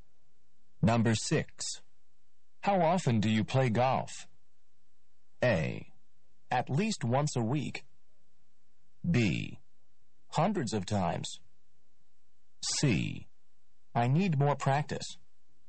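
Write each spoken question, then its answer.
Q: How often do you play golf?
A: A: At least once a week.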